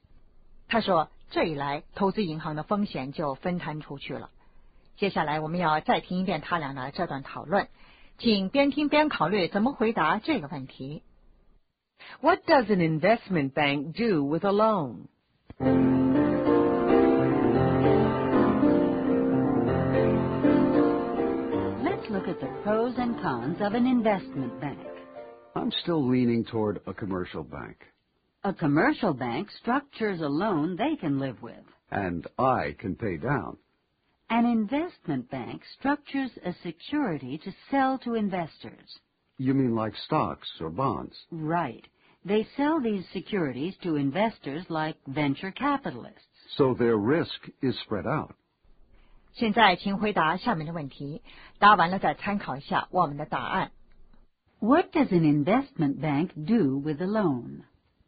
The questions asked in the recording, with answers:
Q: What does an investment bank do with a loan?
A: They sell it.To someone else.